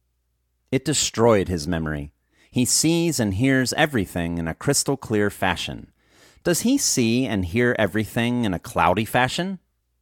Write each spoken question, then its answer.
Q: Does he see and hear everything in a cloudy fashion?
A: No, he doesn't see and hear everything in a cloudy fashion.